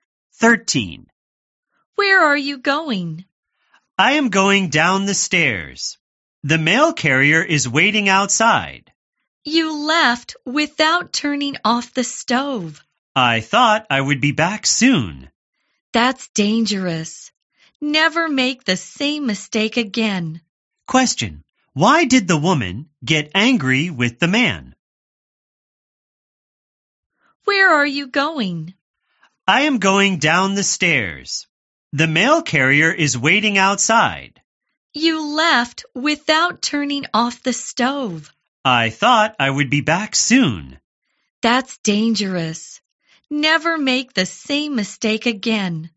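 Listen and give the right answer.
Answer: He left without turning off the stove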